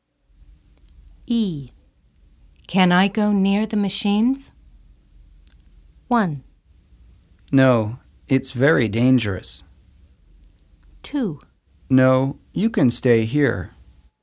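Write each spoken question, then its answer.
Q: Can I go near the machines?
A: 1: No, it's very dangerous.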